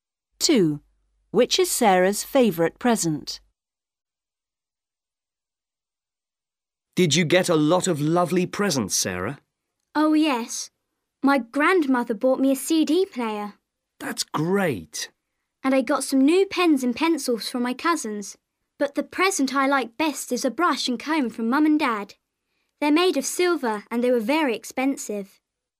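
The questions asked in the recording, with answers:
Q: Which is Sarah's favourite present?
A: a silver brush and comb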